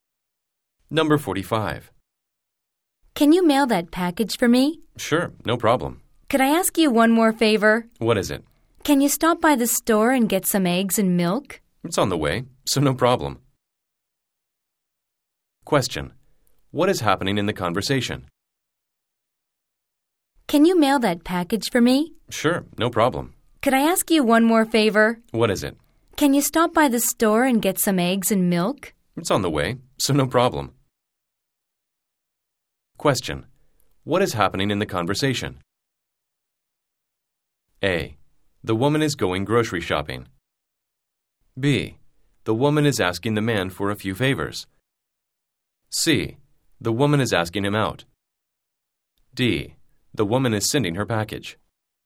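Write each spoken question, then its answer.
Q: What is happening in the conversation?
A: B: The woman is asking the man for a few favors.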